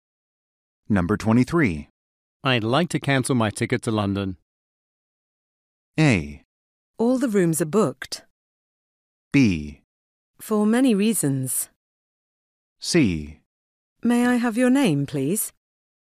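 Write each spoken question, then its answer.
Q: I'd like to cancel my ticket to London.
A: C: May I have your name, please?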